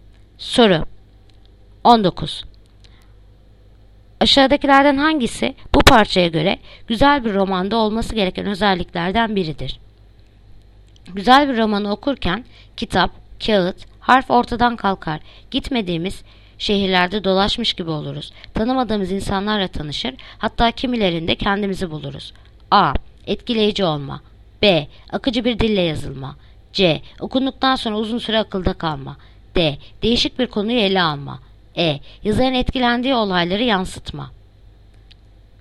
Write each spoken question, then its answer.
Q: Aşağıdakilerden hangisi bu parçaya göre güzel bir romanda olması gereken özelliklerden biridir?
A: Adana. Etkileyici olma.